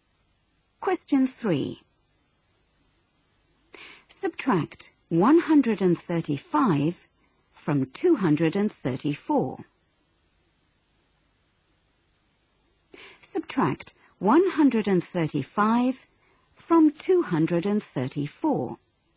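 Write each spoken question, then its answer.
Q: Subtract 135 from 234.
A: 99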